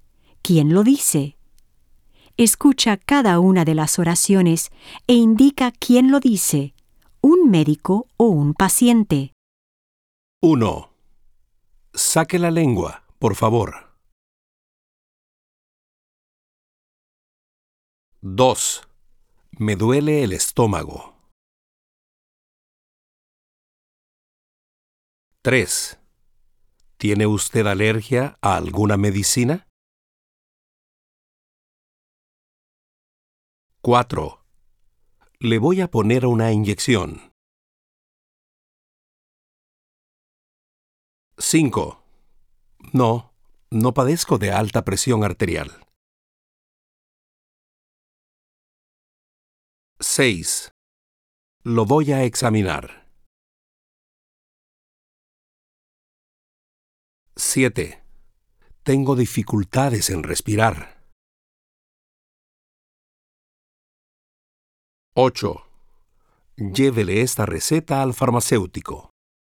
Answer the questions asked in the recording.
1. 1. Médico.
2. 2. Paciente.
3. 3. Médico.
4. Médico.
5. 5. Paciente.
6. 6. Médico.
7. 7. Paciente.
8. 8. Médico.